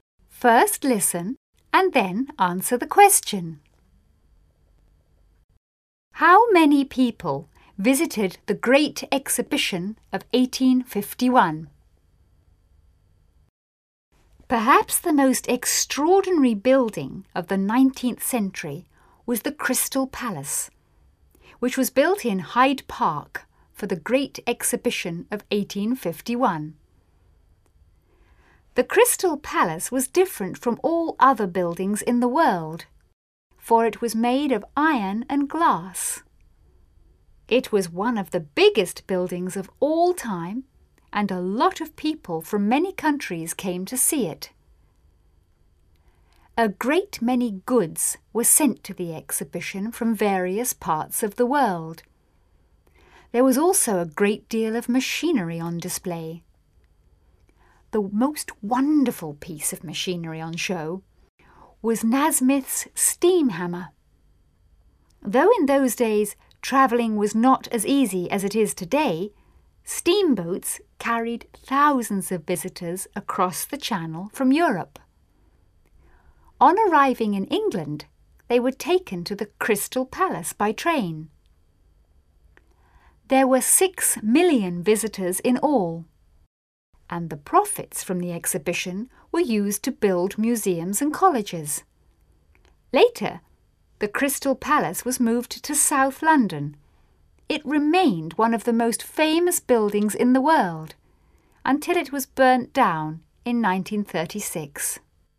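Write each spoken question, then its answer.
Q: How many people visited the Great Exhibition of 1851?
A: 6 million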